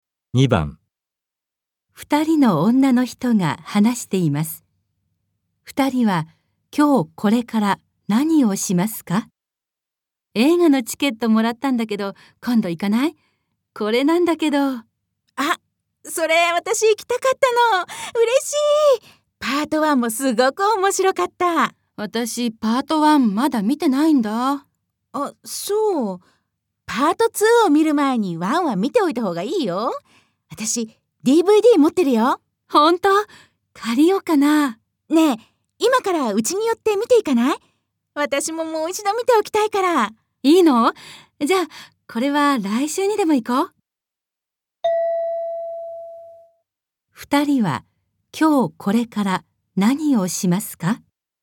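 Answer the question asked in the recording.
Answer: 友達の家でパート1のDVDを見る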